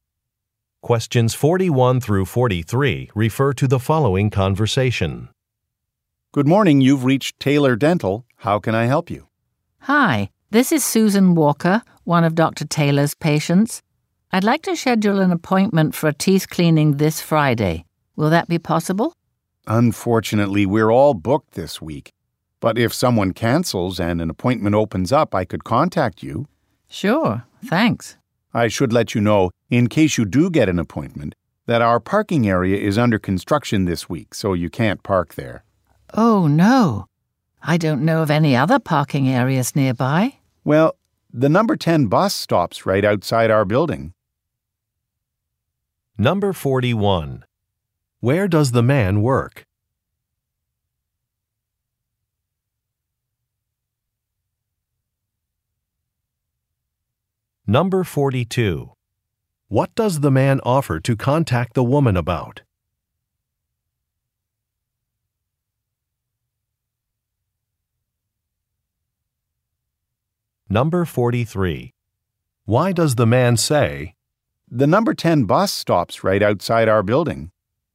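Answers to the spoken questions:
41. At a dental office
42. An appointment opening up
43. To suggest she take the bus because parking is unavailable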